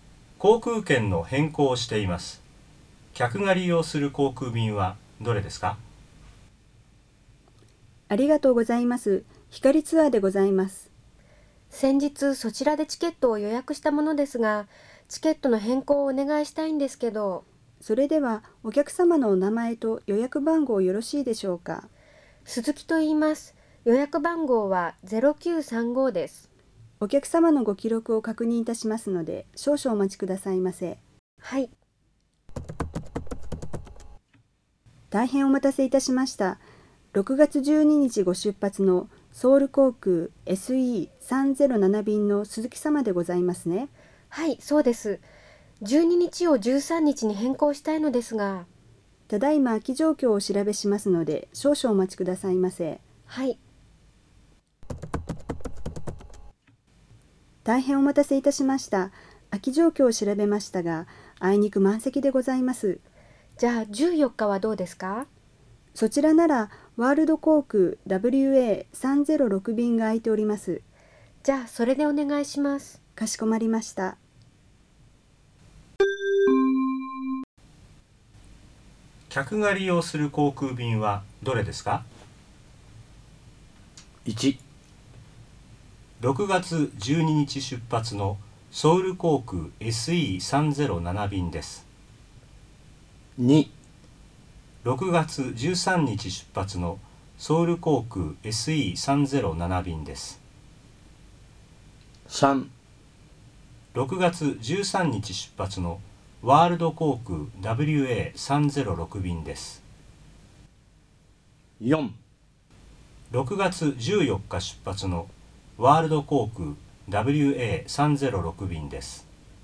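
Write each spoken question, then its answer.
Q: 客が利用する航空便はどれですか?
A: 4: 6月14日出発のワールド航空 WA306 便です。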